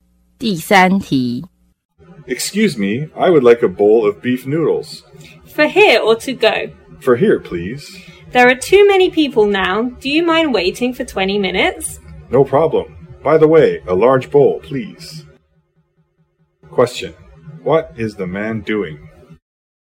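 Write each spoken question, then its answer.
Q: What is the man doing?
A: Ordering beef noodles at a restaurant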